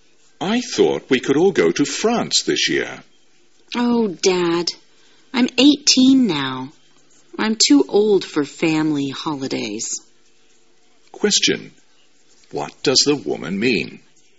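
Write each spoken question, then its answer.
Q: What does the woman mean?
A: She doesn't want to go on a family holiday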